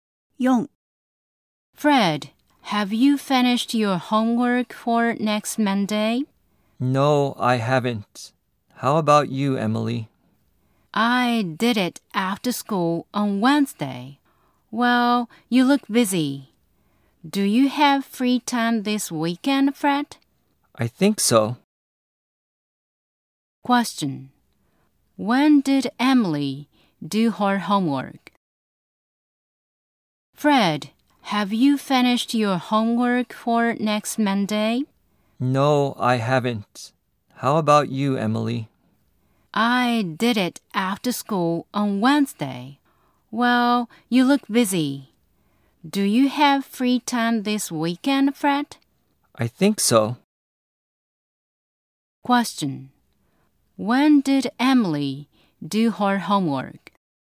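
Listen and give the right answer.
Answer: After school on Wednesday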